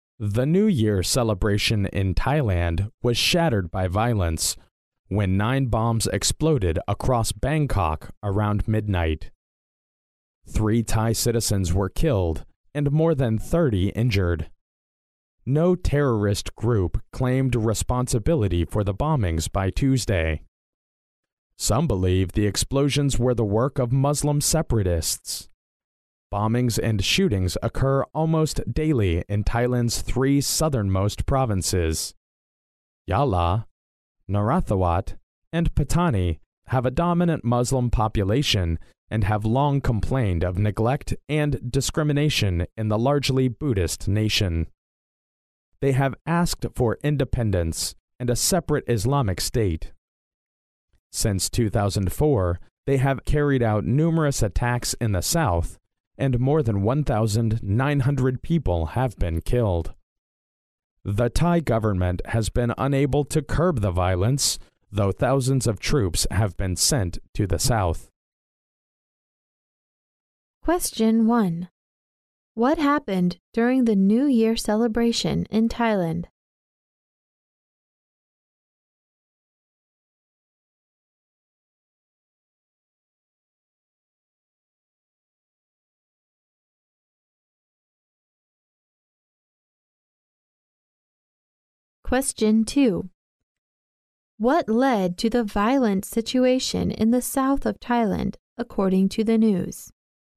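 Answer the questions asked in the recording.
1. Nine bombs exploded across Bangkok around midnight, killing 3 and injuring more than 30.
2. The Muslim population's long complaints of neglect and discrimination, and their demand for independence and a separate Islamic state.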